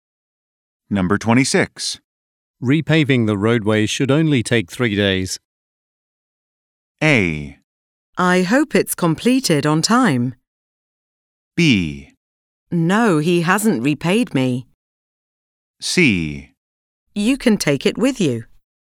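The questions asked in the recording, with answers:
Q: Repaving the roadway should only take 3 days.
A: A: I hope it's completed on time.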